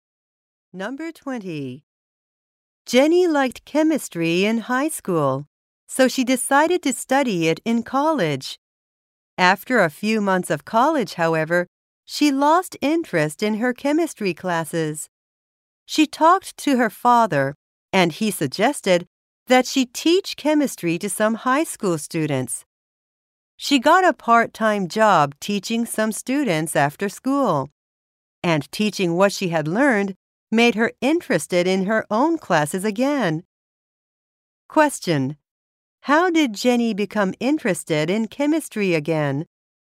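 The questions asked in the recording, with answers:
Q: How did Jenny become interested in chemistry again?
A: By teaching chemistry to high school students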